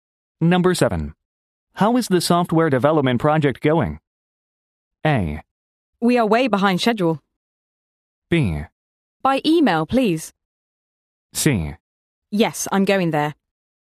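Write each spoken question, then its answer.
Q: How is the software development project going?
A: A: We are way behind schedule.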